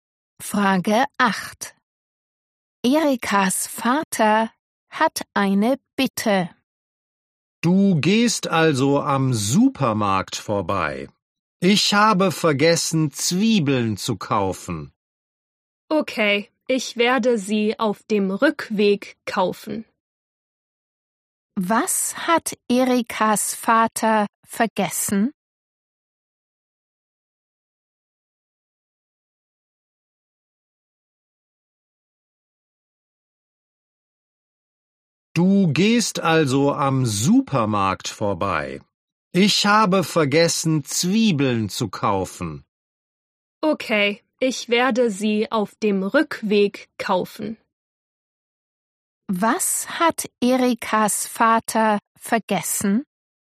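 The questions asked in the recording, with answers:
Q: Was hat Erikas Vater vergessen?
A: Zwiebeln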